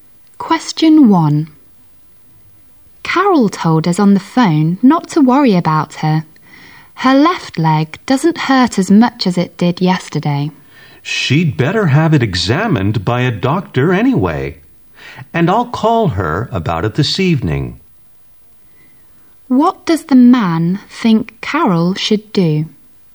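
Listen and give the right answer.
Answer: Have her leg examined by a doctor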